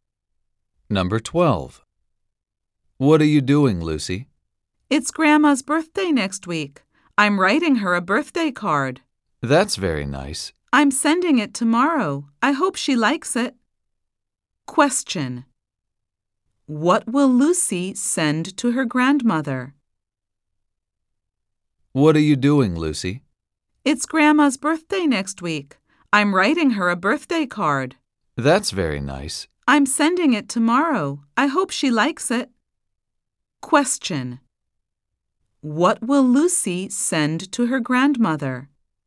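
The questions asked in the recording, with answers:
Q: What will Lucy send to her grandmother?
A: A birthday card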